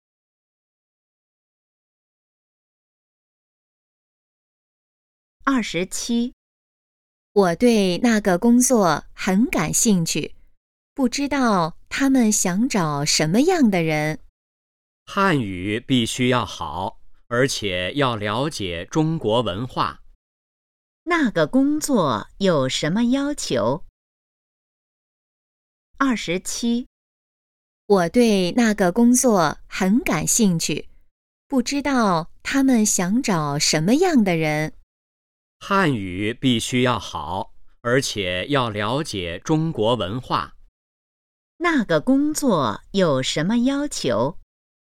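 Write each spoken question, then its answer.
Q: 那个工作有什么要求?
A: 汉语要好,要了解中国文化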